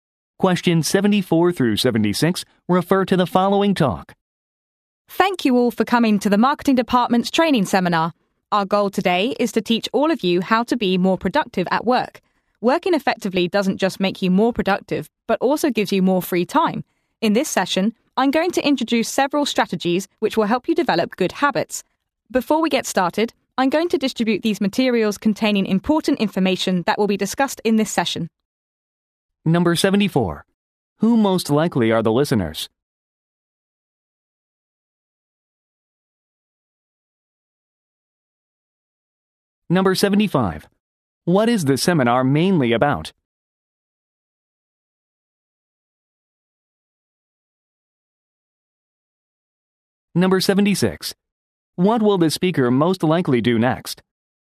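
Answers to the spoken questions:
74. Marketing Department employees
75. Being more productive at work
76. Hand out materials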